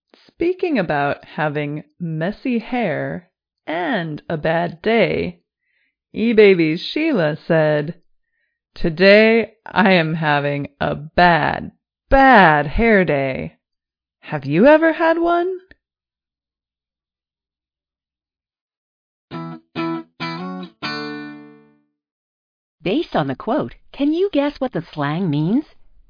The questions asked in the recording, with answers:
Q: Based on the quote, can you guess what the slang means?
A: Bad hair day is an expression meaning day when everything seems to go wrong.